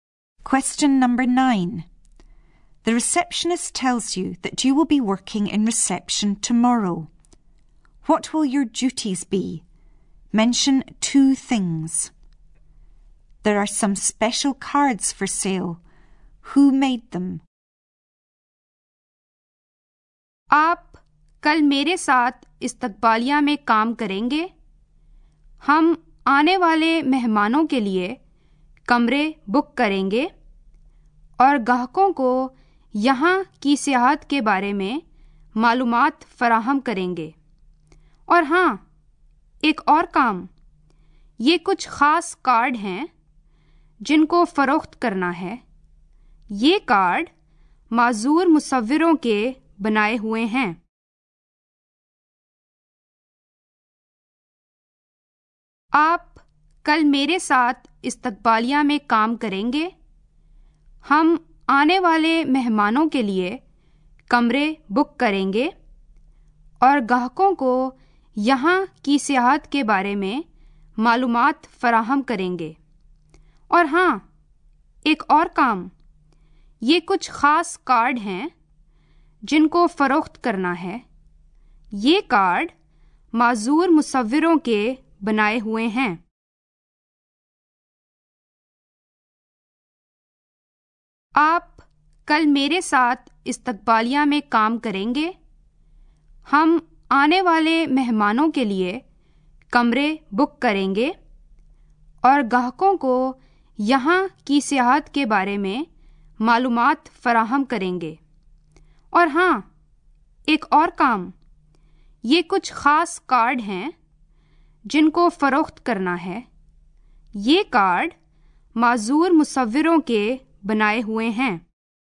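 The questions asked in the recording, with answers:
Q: What will your duties be?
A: Booking rooms for arriving guests; giving customers tourist information; selling cards

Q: Who made them?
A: Disabled artists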